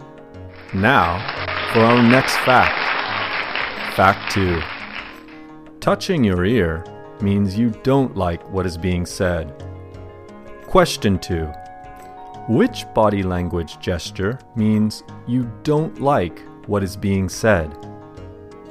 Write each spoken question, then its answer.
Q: Which body language gesture means you don't like what is being said?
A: Touching your ear means you don't like what is being said.